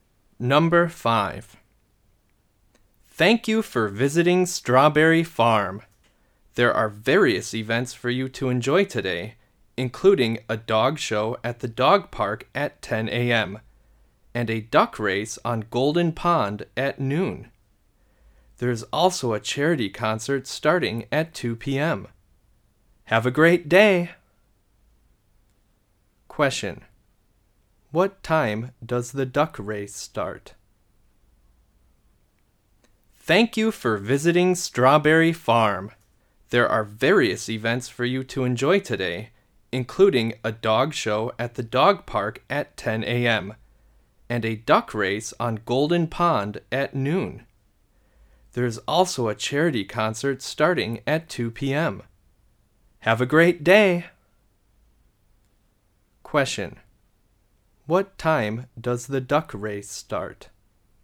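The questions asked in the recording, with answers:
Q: What time does the duck race start?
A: At noon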